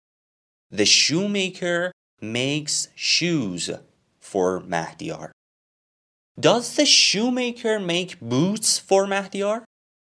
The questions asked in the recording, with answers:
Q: Does the shoemaker make boots for Mahdiyar?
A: No. The shoemaker makes shoes for Mahdiyar.